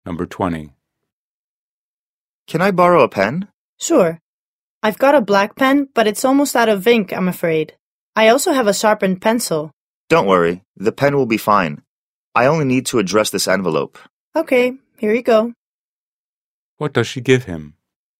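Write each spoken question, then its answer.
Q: What does she give him?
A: A black pen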